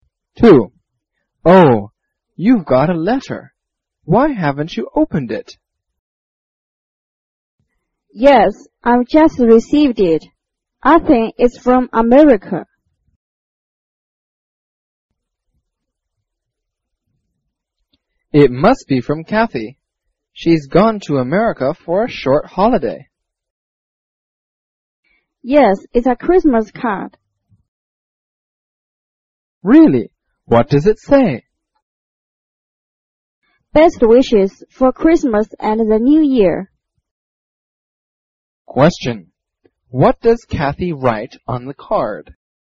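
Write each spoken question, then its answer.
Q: What does Kathy write on the card?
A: Best wishes for Christmas and the New Year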